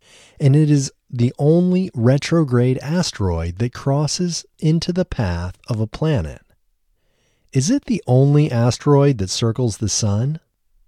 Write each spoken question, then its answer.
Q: Is it the only asteroid that circles the sun?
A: No, it's not the only asteroid that circles the sun.